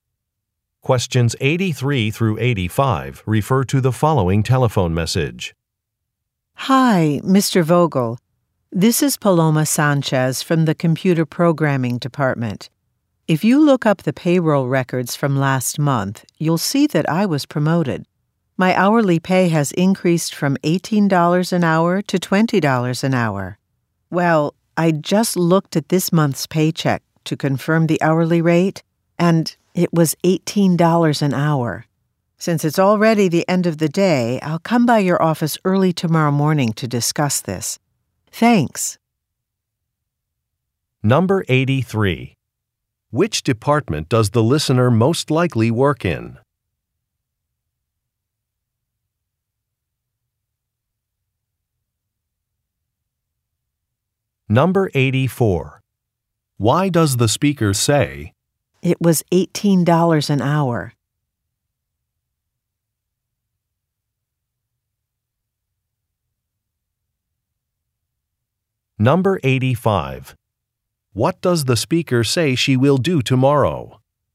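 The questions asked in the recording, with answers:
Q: Why does the speaker say, "It was $18 an hour"?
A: To point out a pay error: her raise was not applied

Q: What does the speaker say she will do tomorrow?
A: Come by the listener's office early in the morning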